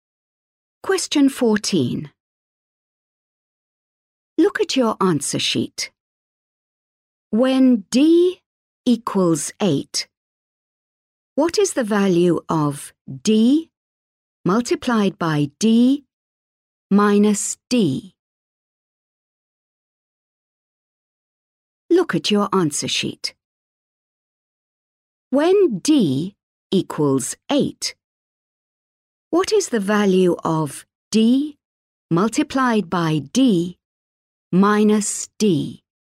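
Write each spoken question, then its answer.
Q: When D equals 8, what is the value of D multiplied by D minus D?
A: 56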